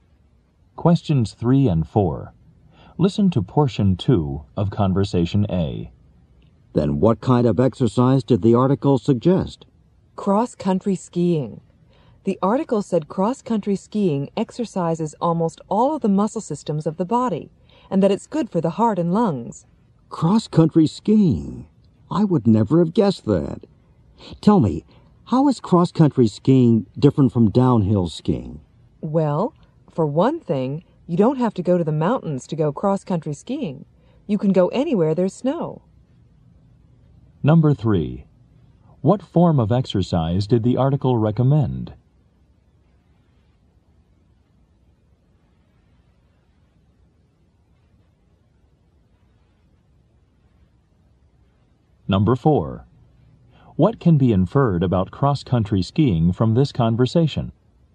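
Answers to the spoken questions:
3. Cross-country skiing
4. It can be done anywhere there is snow, not only in the mountains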